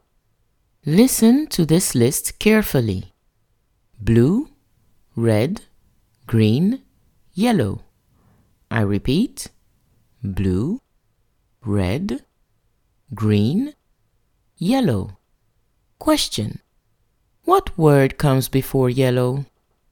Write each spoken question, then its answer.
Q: What word comes before yellow?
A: The word that comes before yellow is green.